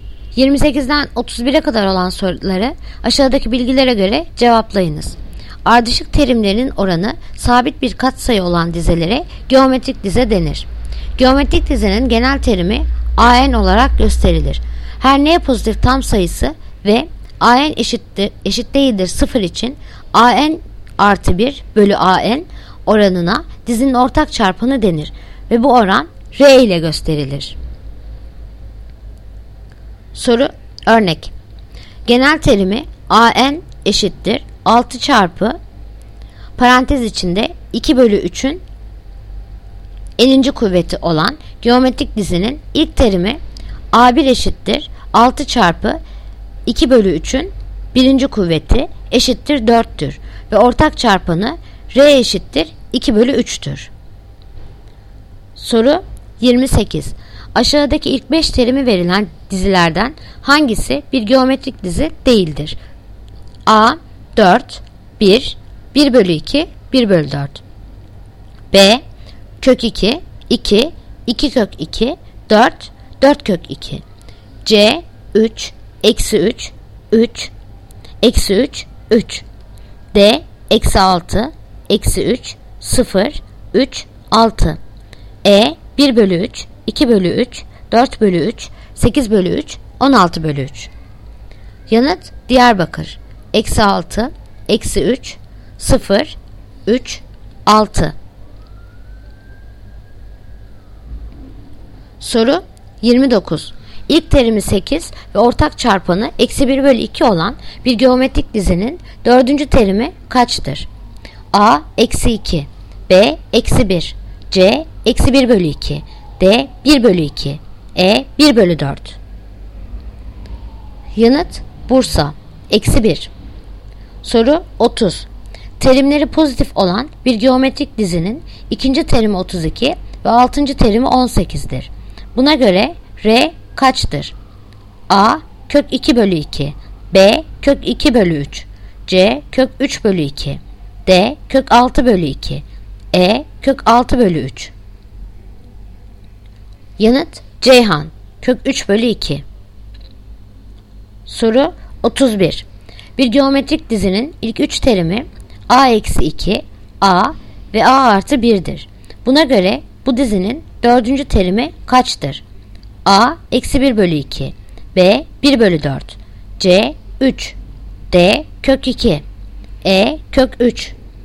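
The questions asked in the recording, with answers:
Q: Aşağıdaki ilk 5 terimi verilen dizilerden hangisi bir geometrik dizi değildir?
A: D: Eksi 6, eksi 3, 0, 3, 6

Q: İlk terimi 8 ve ortak çarpanı eksi 1 bölü 2 olan bir geometrik dizinin dördüncü terimi kaçtır?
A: B: Eksi 1

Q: Buna göre R kaçtır?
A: C: Kök 3 bölü 2

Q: Buna göre bu dizinin 4. terimi kaçtır?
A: Yanıt: Adana. Eksi 1 bölü 2.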